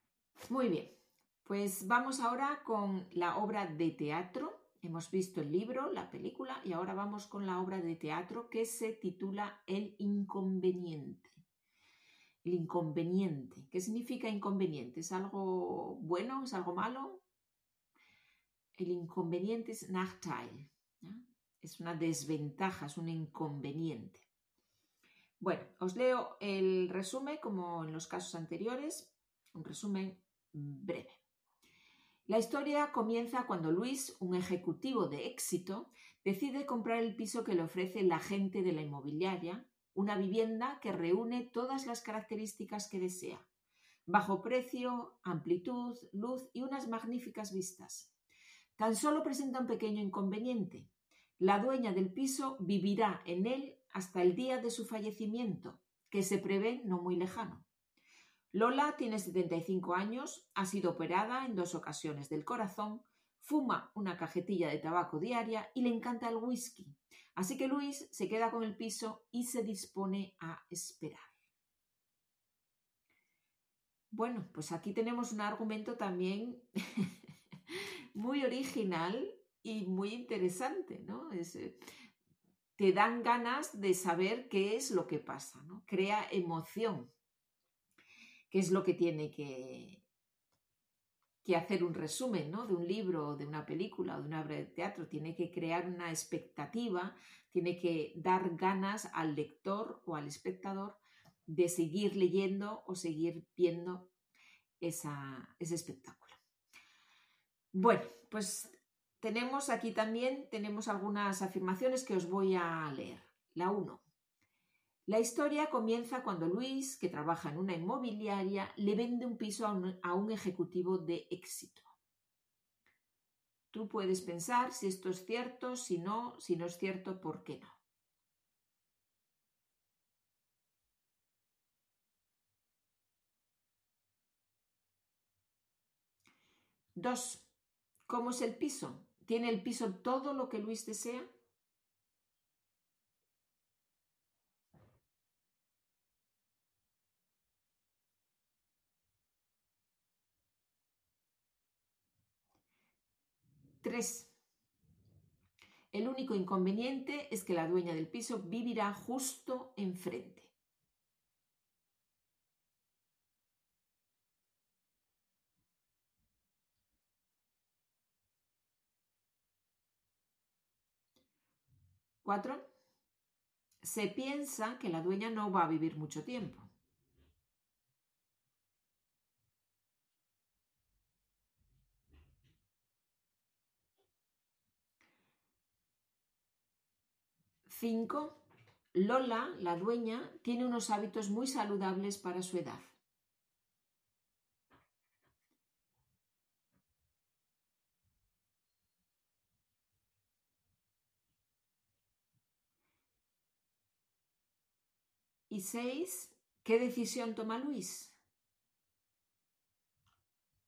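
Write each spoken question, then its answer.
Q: La historia comienza cuando Luis, que trabaja en una inmobiliaria, le vende un piso a un ejecutivo de éxito.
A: Falso: Luis es el ejecutivo que compra el piso

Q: ¿Cómo es el piso? ¿Tiene el piso todo lo que Luis desea?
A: Sí: bajo precio, amplitud, luz y magníficas vistas

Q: El único inconveniente es que la dueña del piso vivirá justo enfrente.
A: Falso: la dueña vivirá en el piso hasta su fallecimiento

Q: Se piensa que la dueña no va a vivir mucho tiempo.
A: Verdadero

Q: Lola, la dueña, tiene unos hábitos muy saludables para su edad.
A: Falso: fuma una cajetilla diaria y le encanta el whisky

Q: ¿Qué decisión toma Luis?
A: Se queda con el piso y espera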